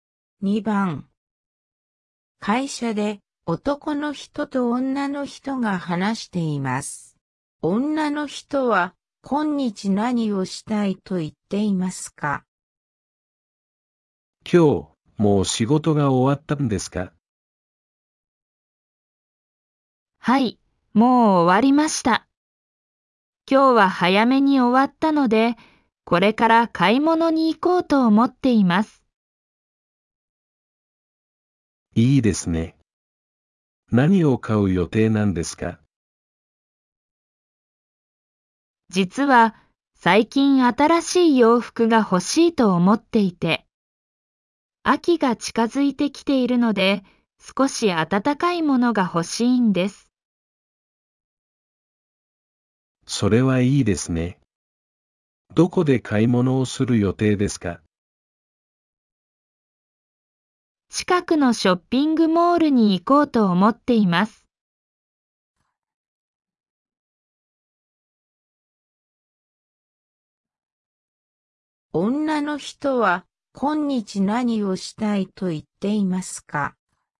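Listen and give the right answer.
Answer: ショッピングモールで暖かい洋服を買いたい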